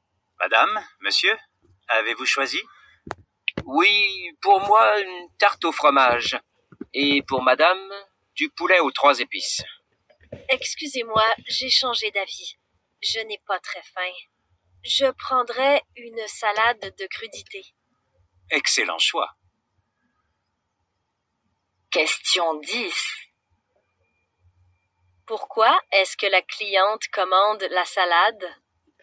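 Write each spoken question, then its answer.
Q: Pourquoi est-ce que la cliente commande la salade?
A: Parce qu'elle n'a pas très faim.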